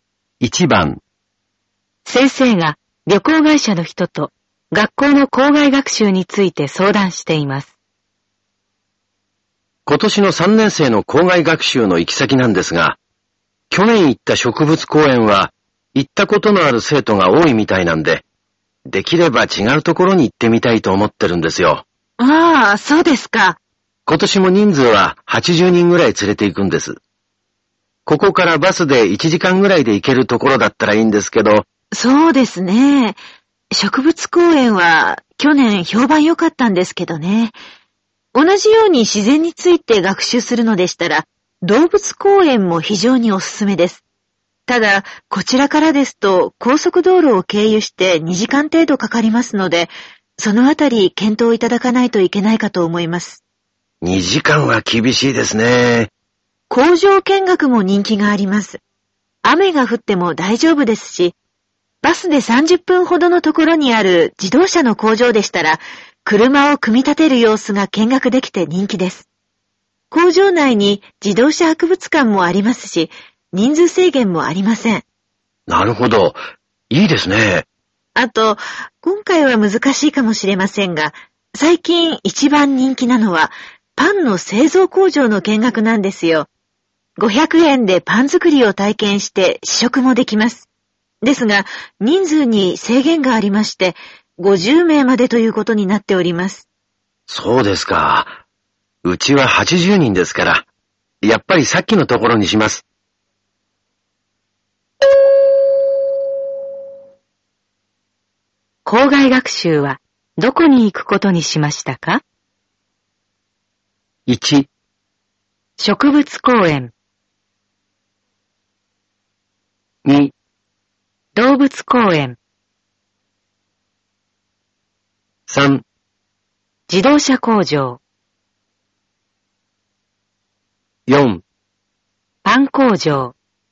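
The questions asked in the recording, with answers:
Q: 校外学習はどこに行くことにしましたか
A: 3: 自動車工場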